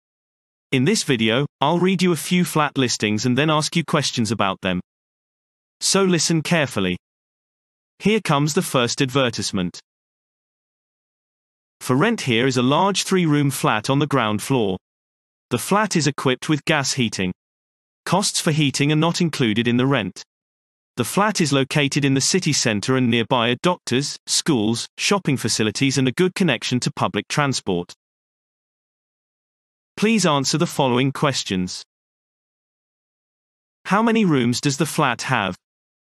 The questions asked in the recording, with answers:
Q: How many rooms does the flat have?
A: Answer. It is a three-room flat.